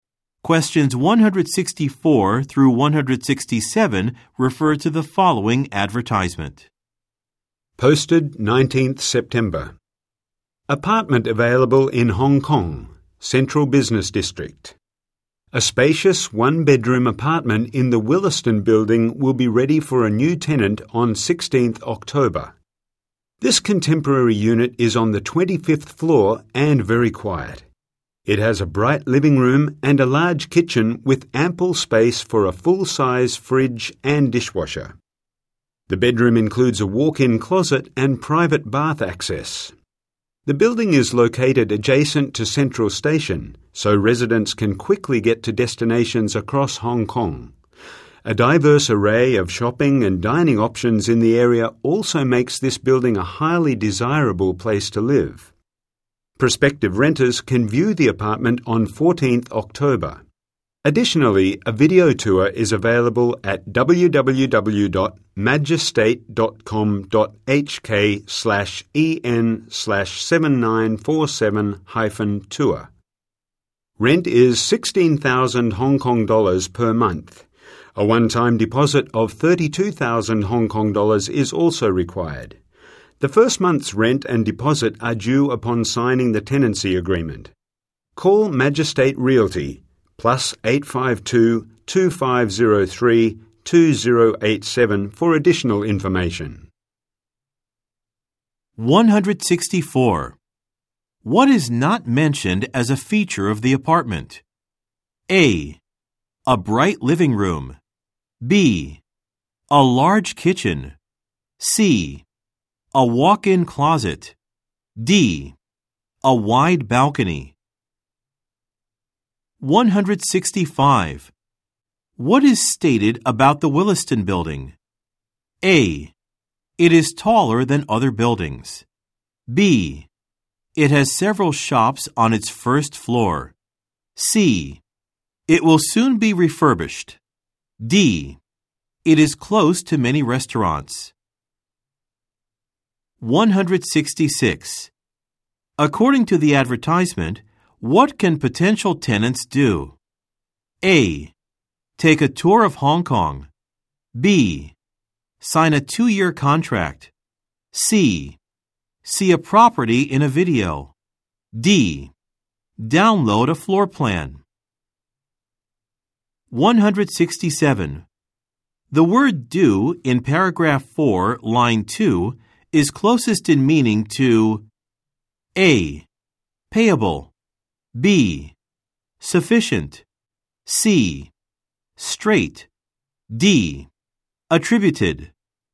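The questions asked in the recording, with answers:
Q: What is not mentioned as a feature of the apartment?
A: D: A wide balcony.

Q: What is stated about the Williston Building?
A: D: It is close to many restaurants.

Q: According to the advertisement, what can potential tenants do?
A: C: See a property in a video.

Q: The word due in paragraph 4, line 2 is closest in meaning to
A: A: Payable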